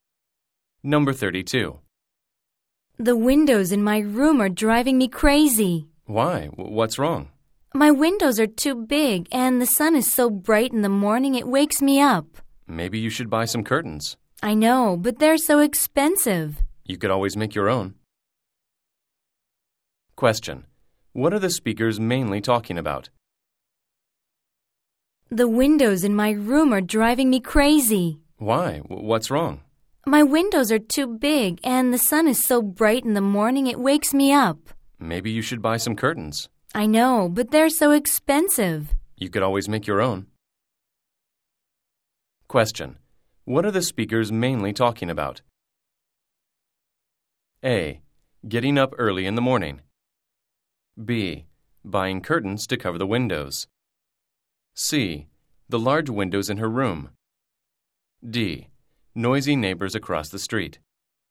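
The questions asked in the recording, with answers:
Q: What are the speakers mainly talking about?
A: C: The large windows in her room.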